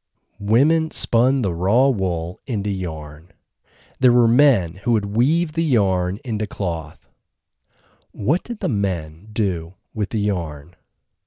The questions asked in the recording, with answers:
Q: What did the men do with the yarn?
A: The men would weave the yarn into cloth.